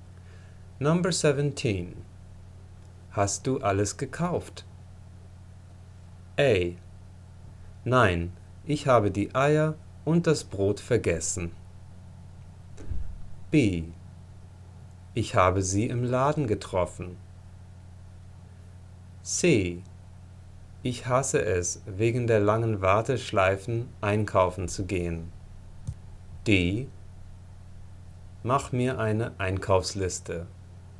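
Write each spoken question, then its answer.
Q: Hast du alles gekauft?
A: A: Nein, ich habe die Eier und das Brot vergessen.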